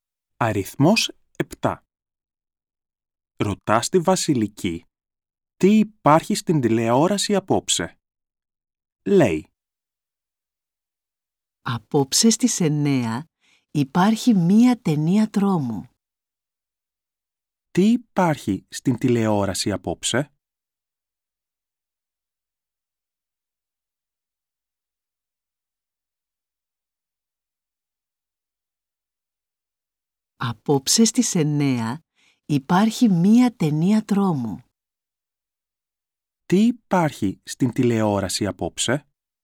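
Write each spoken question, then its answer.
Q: Τι υπάρχει στην τηλεόραση απόψε?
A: Μία ταινία τρόμου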